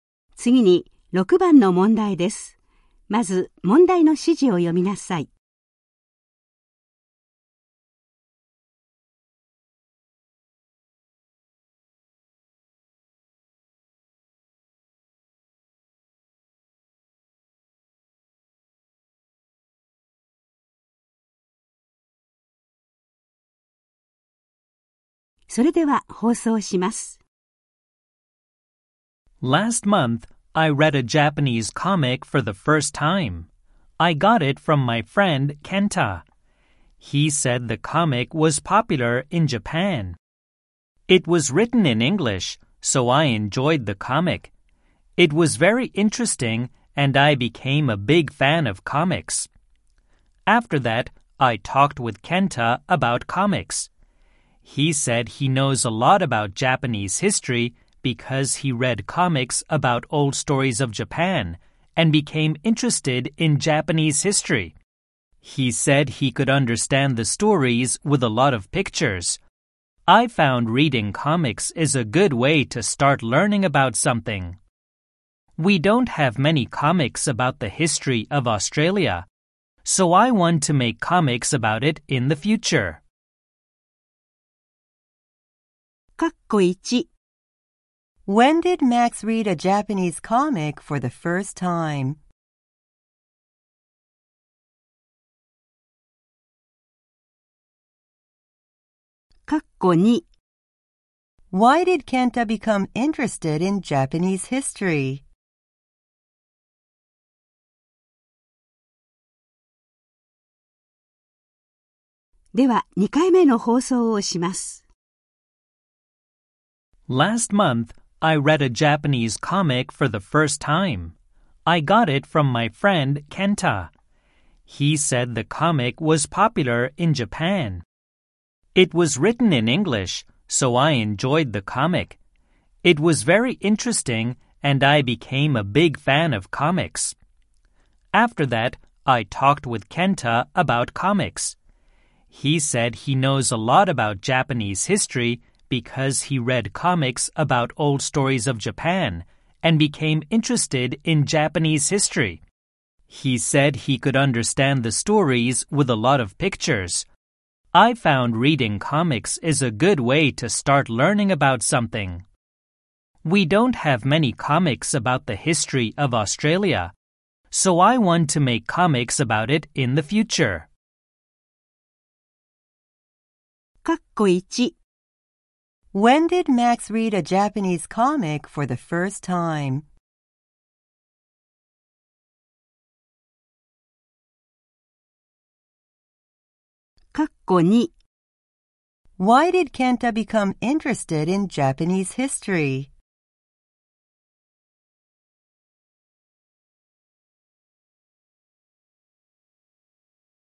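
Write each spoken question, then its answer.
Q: When did Max read a Japanese comic for the first time?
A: Last month.

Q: Why did Kenta become interested in Japanese history?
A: Because he read comics about old stories of Japan.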